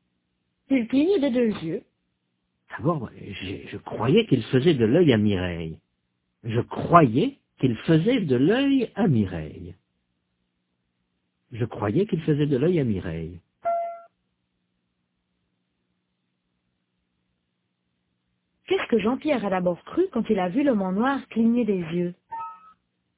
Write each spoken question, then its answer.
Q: Qu'est-ce que Jean-Pierre a d'abord cru quand il a vu l'homme en noir cligner des yeux?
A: Il a cru qu'il faisait de l'œil à Mireille.